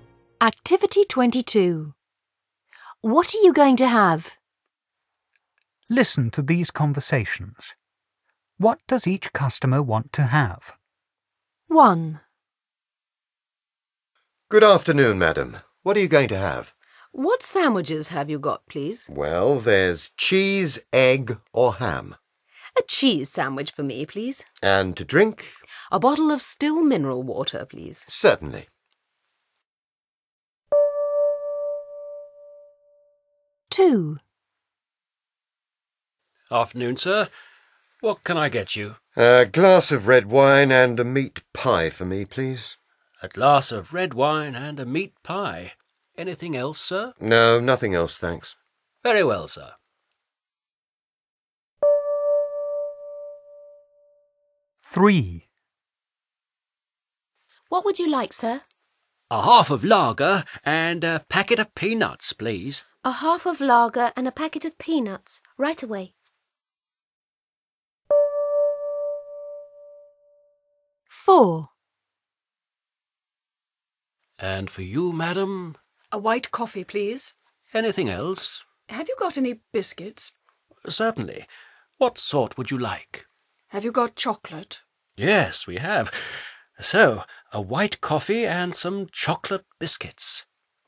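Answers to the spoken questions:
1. A cheese sandwich and a bottle of still mineral water
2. A glass of red wine and a meat pie
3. A half of lager and a packet of peanuts
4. A white coffee and some chocolate biscuits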